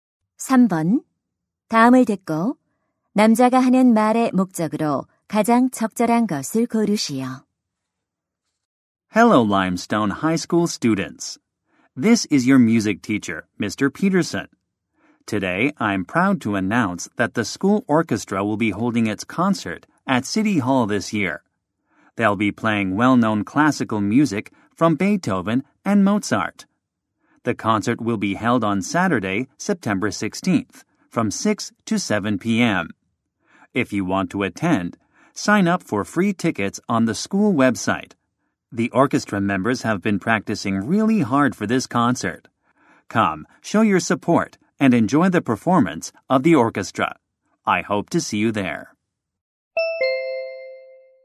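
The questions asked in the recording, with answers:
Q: 다음을 듣고 남자가 하는 말의 목적으로 가장 적절한 것을 고르시오.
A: 학교 오케스트라 시청 연주회를 알리고 참석을 독려하려고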